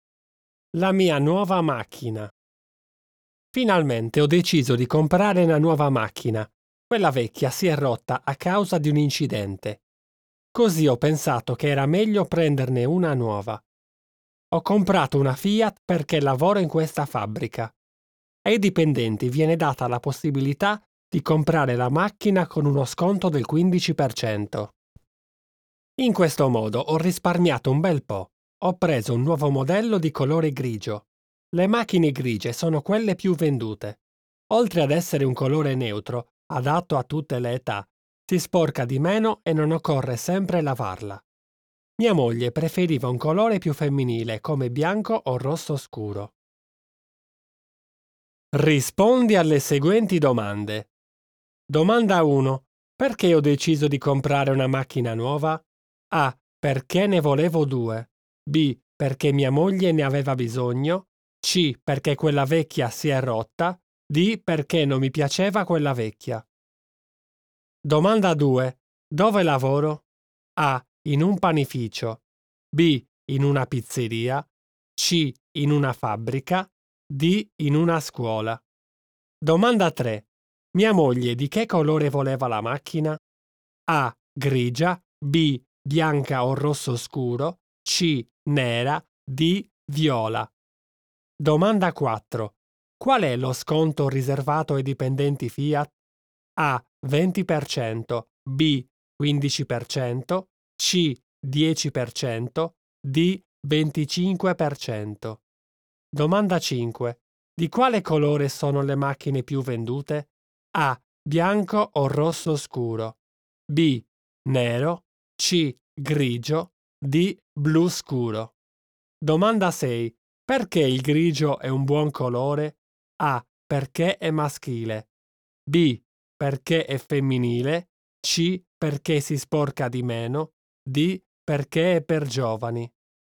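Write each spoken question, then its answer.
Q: Perché ho deciso di comprare una macchina nuova?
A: C: Perché quella vecchia si è rotta.

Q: Dove lavoro?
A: C: In una fabbrica.

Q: Mia moglie di che colore voleva la macchina?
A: B: Bianca o rosso scuro.

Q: Qual è lo sconto riservato ai dipendenti Fiat?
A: B: 15%.

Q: Di quale colore sono le macchine più vendute?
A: C: Grigio.

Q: Perché il grigio è un buon colore?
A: C: Perché si sporca di meno.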